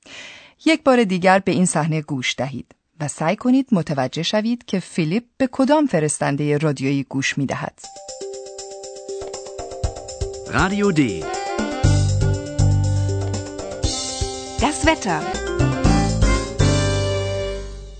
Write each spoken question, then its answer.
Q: یک بار دیگر به این صحنه گوش دهید و سعی کنید متوجه شوید که فیلیپ به کدام فرستنده رادیویی گوش می دهد.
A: این فرستنده رادیویی همان رادیو دی است.